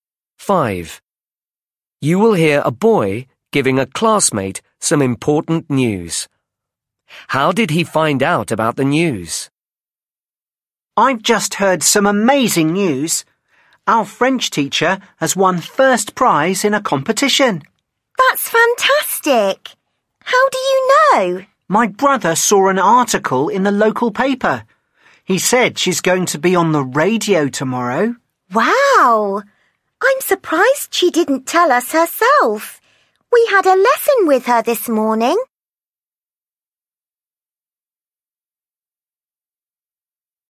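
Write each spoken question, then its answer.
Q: How did he find out about the news?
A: His brother saw an article in the local paper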